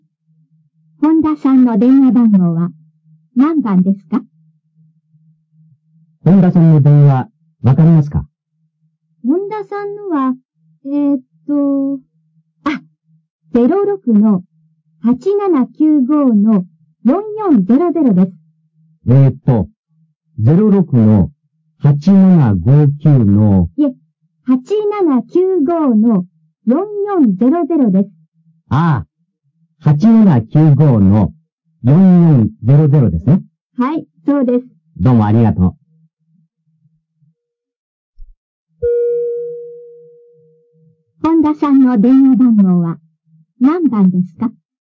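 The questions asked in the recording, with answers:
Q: 本田さんの電話番号は何番ですか?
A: 8795-4400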